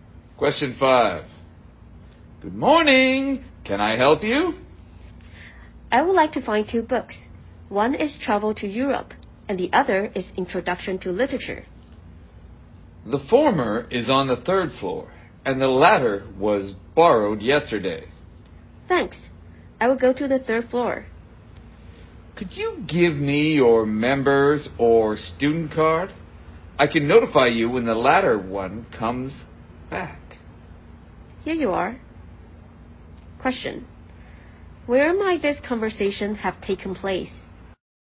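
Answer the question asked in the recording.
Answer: In a library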